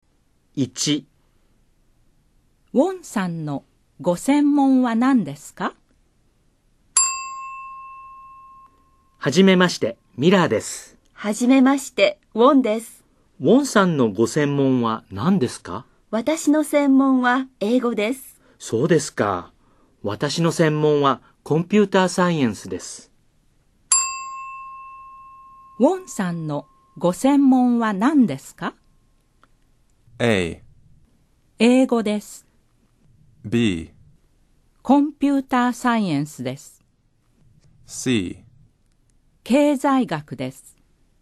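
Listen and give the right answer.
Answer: A: 英語です。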